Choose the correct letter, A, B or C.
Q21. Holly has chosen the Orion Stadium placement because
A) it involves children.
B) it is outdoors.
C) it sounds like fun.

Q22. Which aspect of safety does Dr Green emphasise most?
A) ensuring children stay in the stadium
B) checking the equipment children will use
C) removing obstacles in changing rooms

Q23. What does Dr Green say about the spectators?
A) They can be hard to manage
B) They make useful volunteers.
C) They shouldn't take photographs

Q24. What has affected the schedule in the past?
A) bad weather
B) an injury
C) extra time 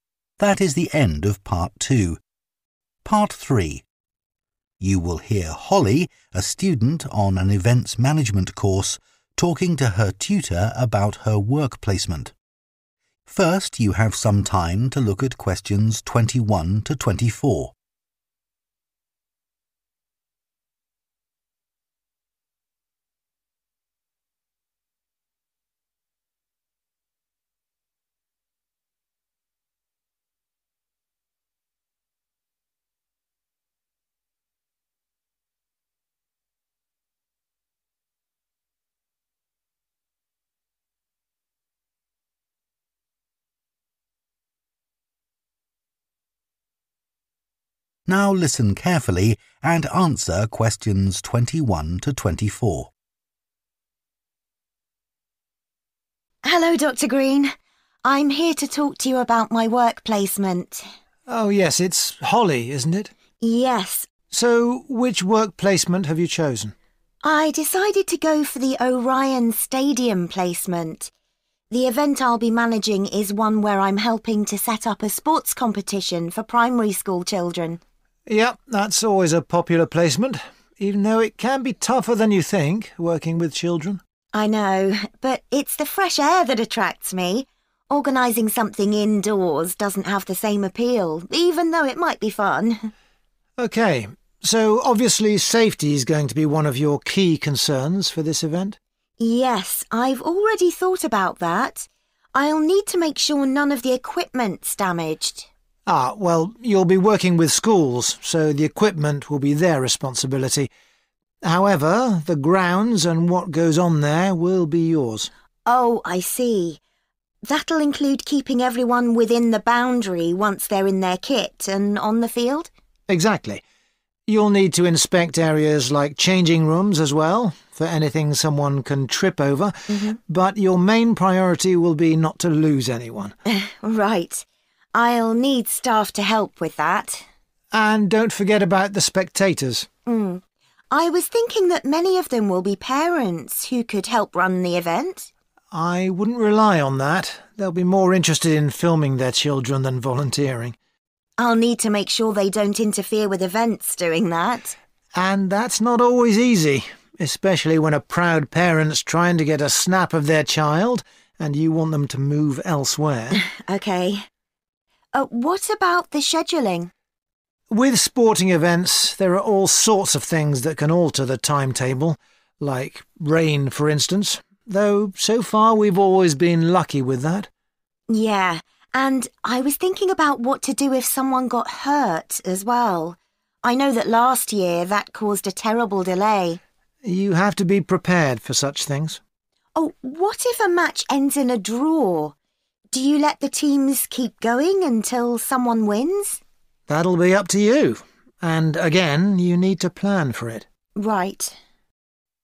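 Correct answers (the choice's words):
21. it is outdoors.
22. ensuring children stay in the stadium
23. They can be hard to manage
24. an injury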